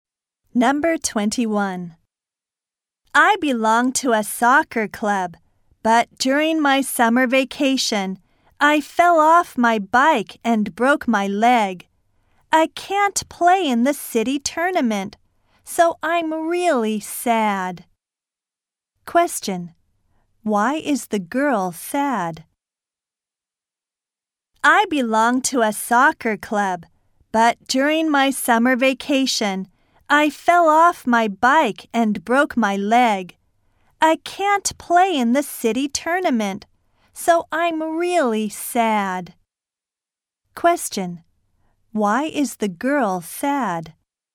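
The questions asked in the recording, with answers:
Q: Why is the girl sad?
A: She broke her leg and can't play in the city tournament.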